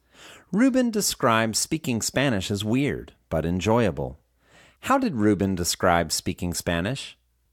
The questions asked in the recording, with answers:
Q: How did Ruben describe speaking Spanish?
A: He describes speaking Spanish as weird, but enjoyable.